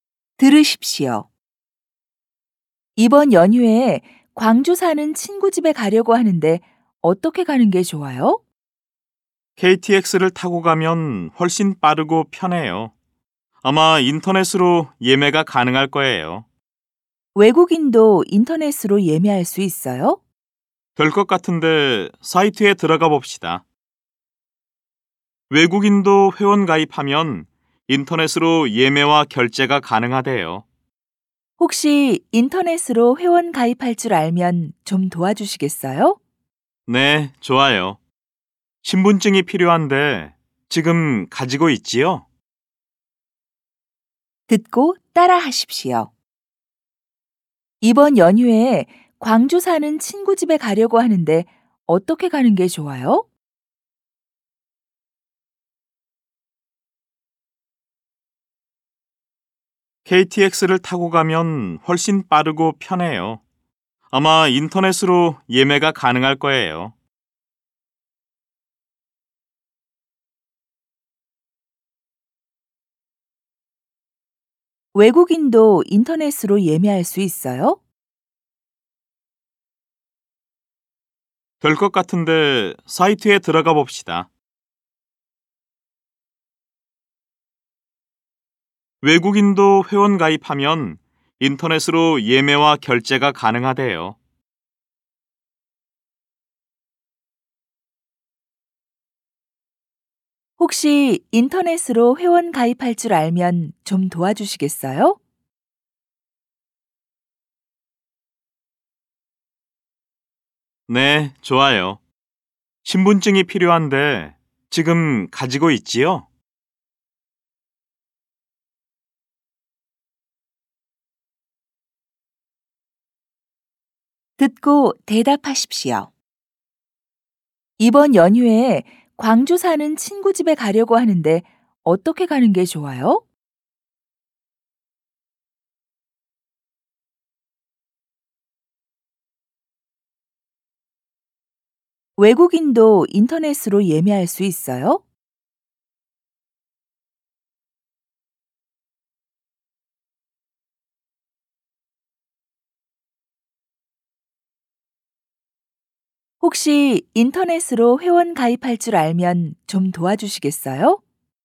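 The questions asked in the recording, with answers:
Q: 이번 연휴에 광주 사는 친구 집에 가려고 하는데 어떻게 가는 게 좋아요?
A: KTX를 타고 가면 훨씬 빠르고 편해요.

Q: 외국인도 인터넷으로 예매할 수 있어요?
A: 네, 외국인도 회원 가입하면 인터넷으로 예매와 결제가 가능해요.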